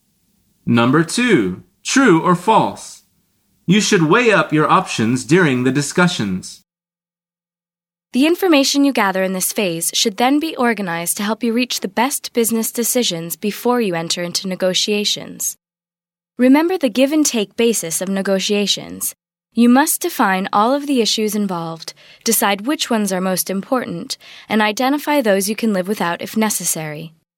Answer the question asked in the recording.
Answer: The answer is false.